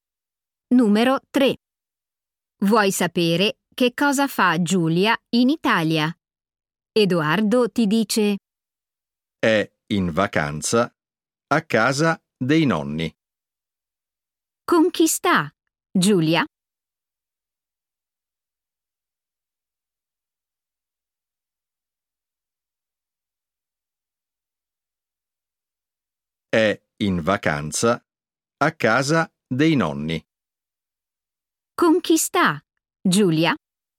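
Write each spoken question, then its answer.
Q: Con chi sta Giulia?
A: con i nonni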